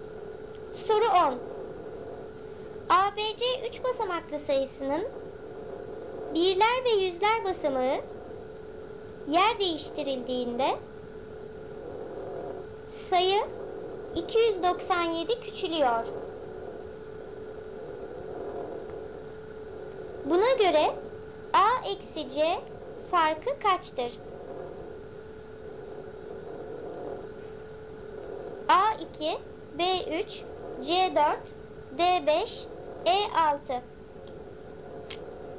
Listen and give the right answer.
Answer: Doğru cevap B 3.